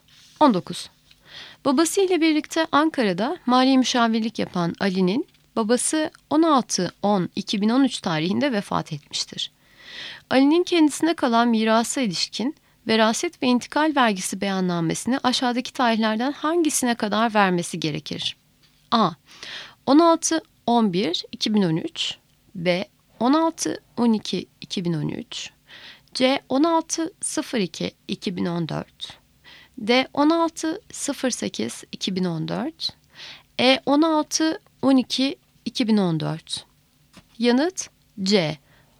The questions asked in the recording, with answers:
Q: Ali'nin kendisine kalan mirasa ilişkin veraset ve intikal vergisi beyannamesini aşağıdaki tarihlerden hangisine kadar vermesi gerekir?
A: Yanıt C. 16.02.2014